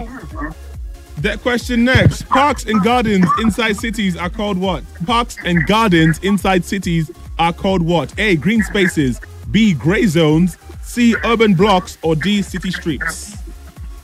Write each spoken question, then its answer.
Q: Parks and gardens inside cities are called what?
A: Green spaces is correct.